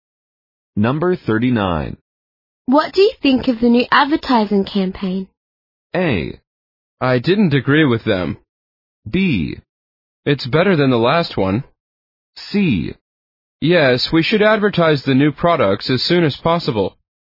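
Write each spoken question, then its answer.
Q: What do you think of the new advertising campaign?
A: B: It's better than the last one.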